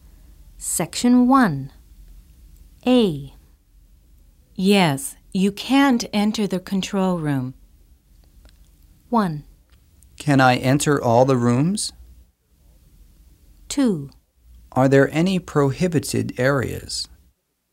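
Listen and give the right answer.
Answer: 2: Are there any prohibited areas?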